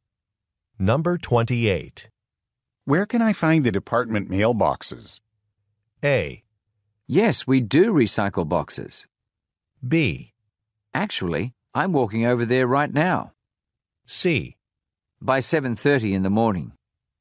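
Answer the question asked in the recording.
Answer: B: Actually, I'm walking over there right now.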